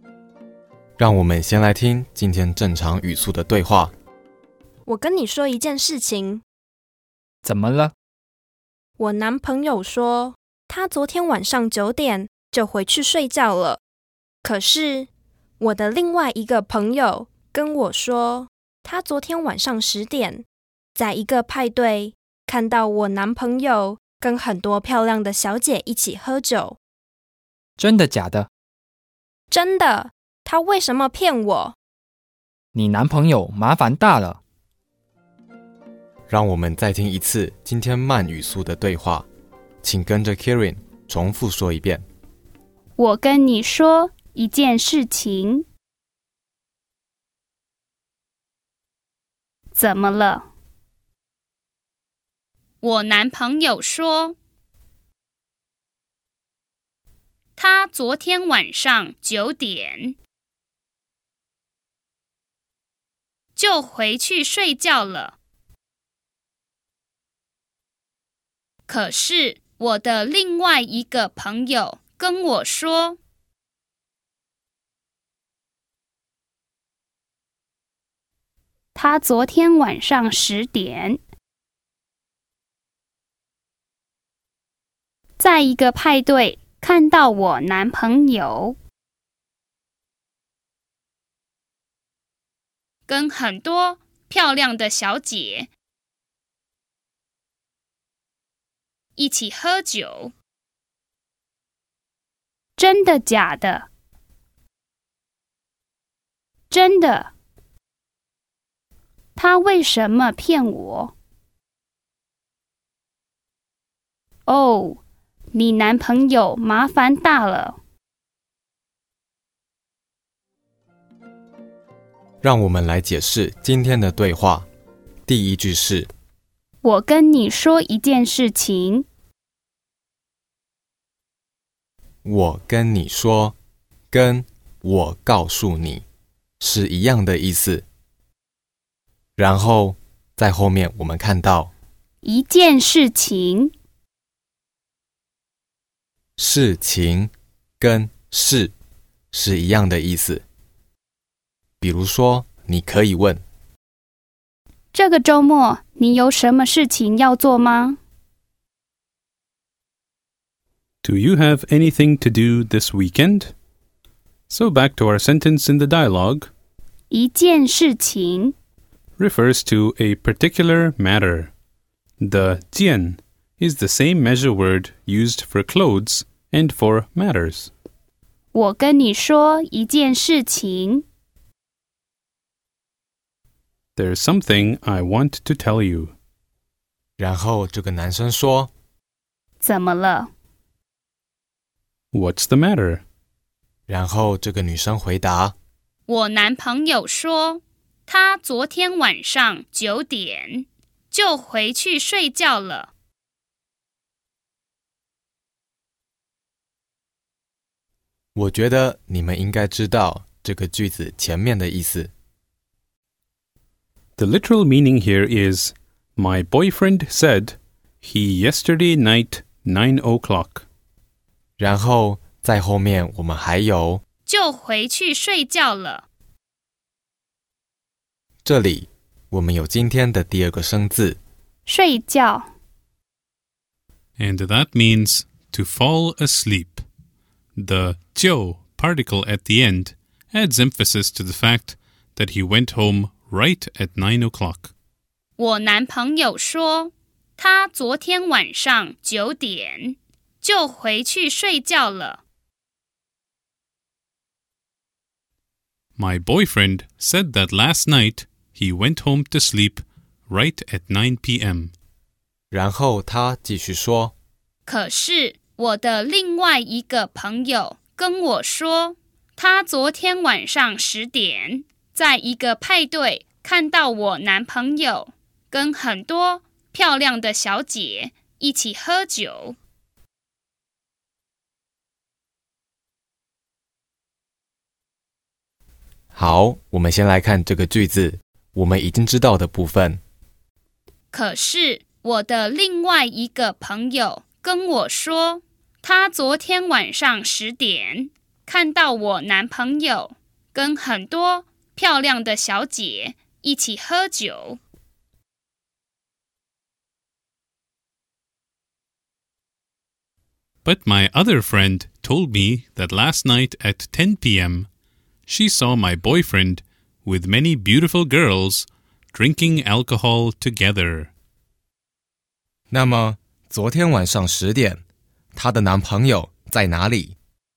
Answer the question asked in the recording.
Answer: 在一个派对。